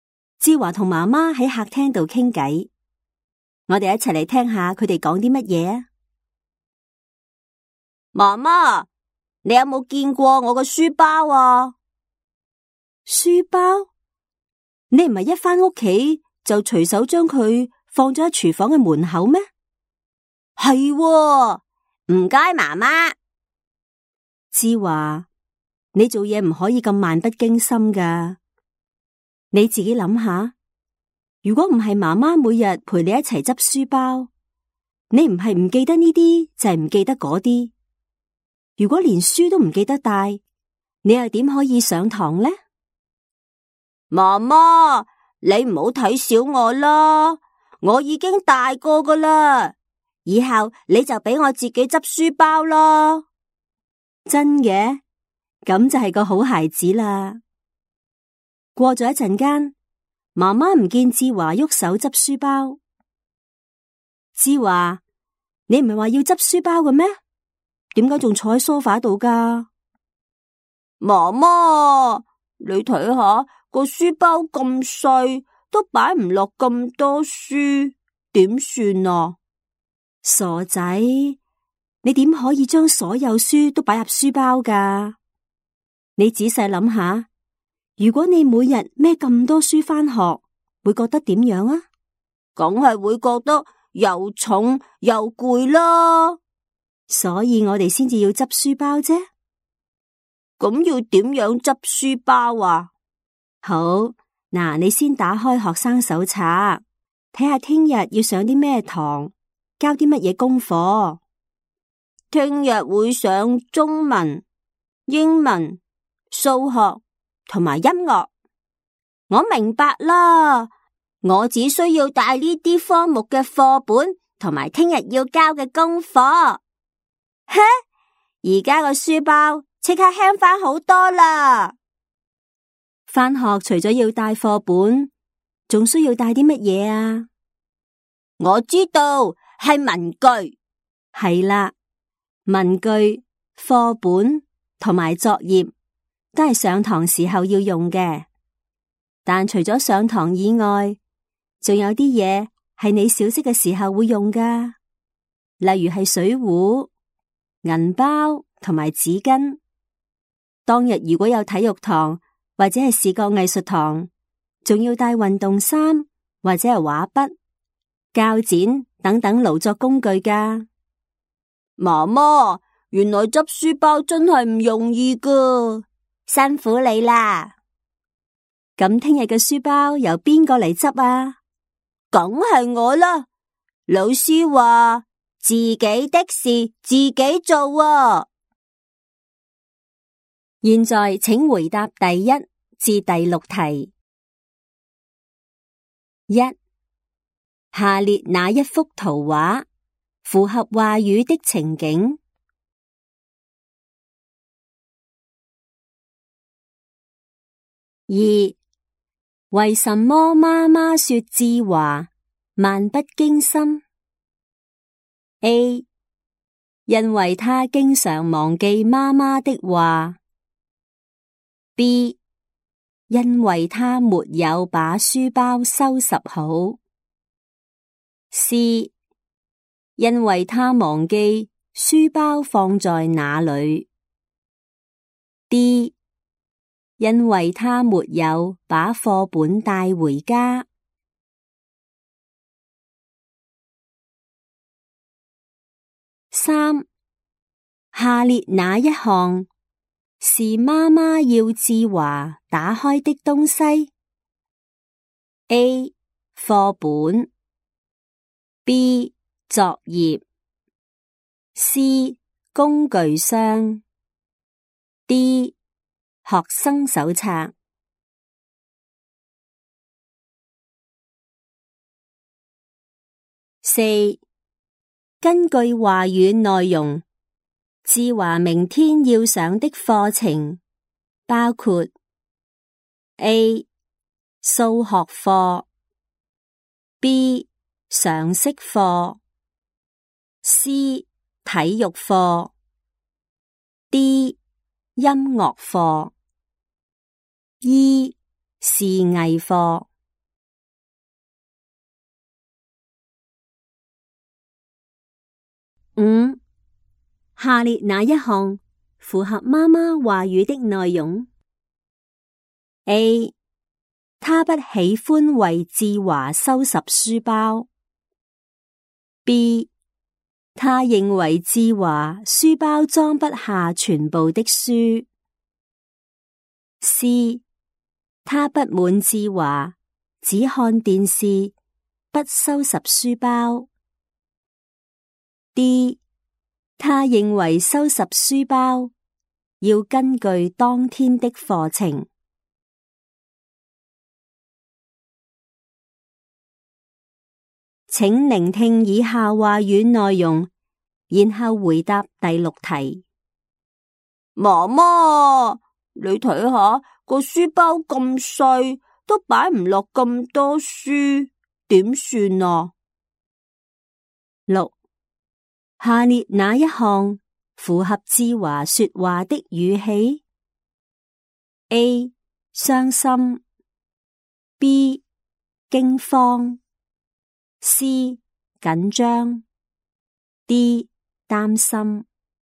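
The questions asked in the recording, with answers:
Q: 为什么妈妈说志华漫不经心?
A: C: 因为她忘记书包放在哪里。

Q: 下列哪一项是妈妈要志华打开的东西?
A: D: 学生手册

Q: 根据话语内容,智华明天要上的课程包括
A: A: 数学课; D: 音乐课

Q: 下列哪一项符合妈妈话语的内容?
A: D: 她认为收拾书包要根据当天的课程。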